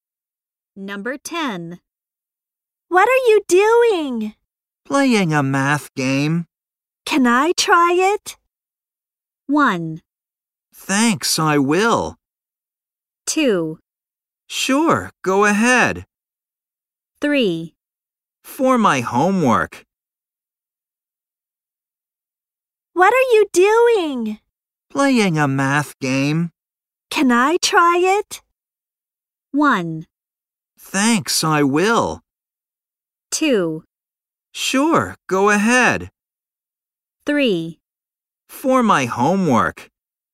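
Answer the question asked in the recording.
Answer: 2: Sure, go ahead.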